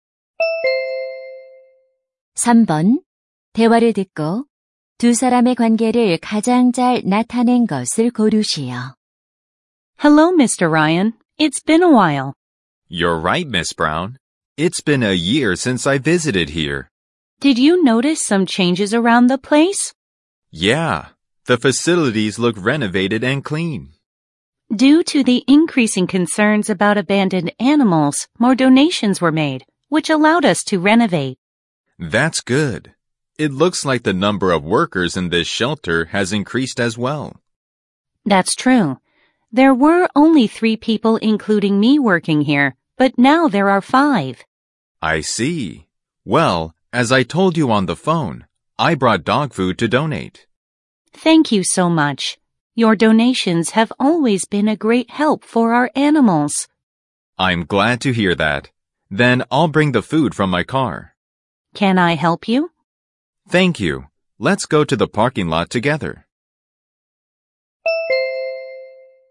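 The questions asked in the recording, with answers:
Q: 대화를 듣고 두 사람의 관계를 가장 잘 나타낸 것을 고르시오.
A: 동물 보호소 직원 - 기부자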